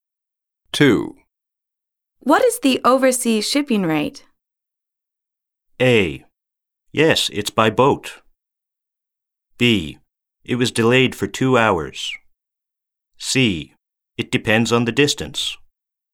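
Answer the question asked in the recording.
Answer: C: It depends on the distance.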